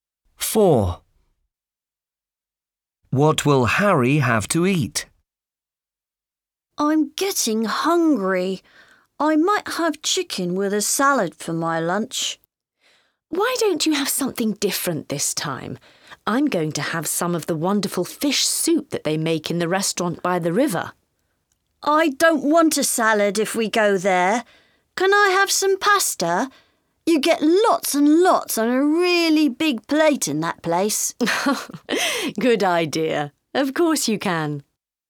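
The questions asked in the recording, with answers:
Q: What will Harry have to eat?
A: pasta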